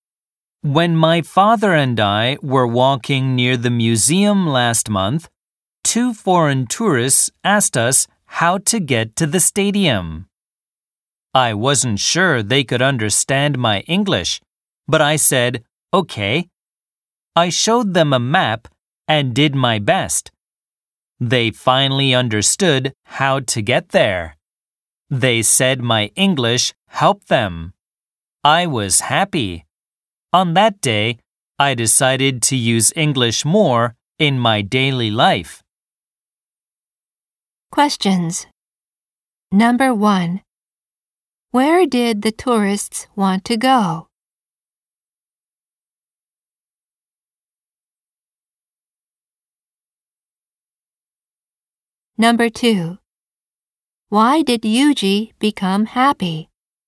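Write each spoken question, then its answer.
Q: Where did the tourists want to go?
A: To the stadium.

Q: Why did Yuji become happy?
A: Because the tourists said his English helped them.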